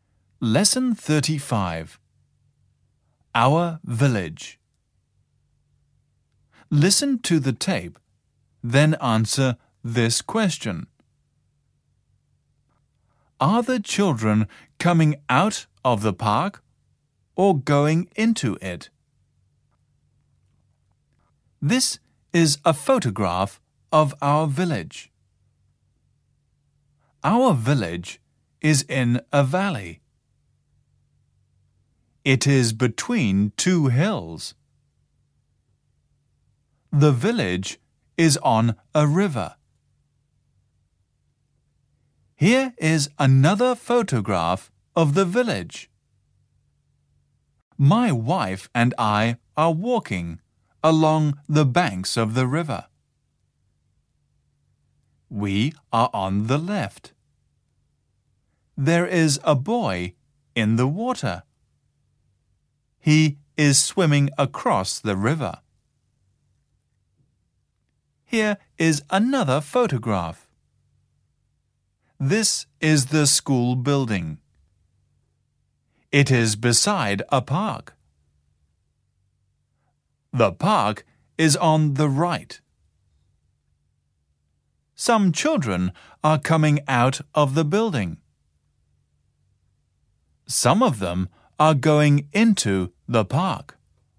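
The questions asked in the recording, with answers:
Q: Are the children coming out of the park or going into it?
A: They are going into it.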